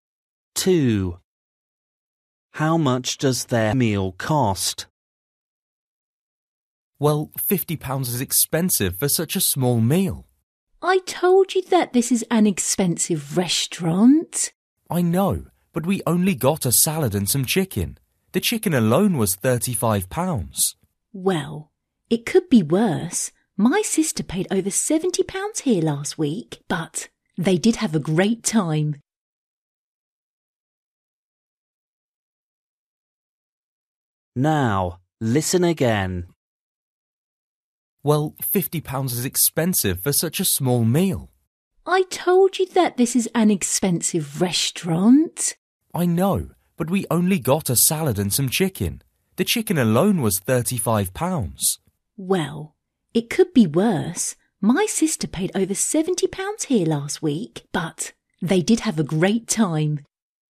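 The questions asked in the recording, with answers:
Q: How much does their meal cost?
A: £50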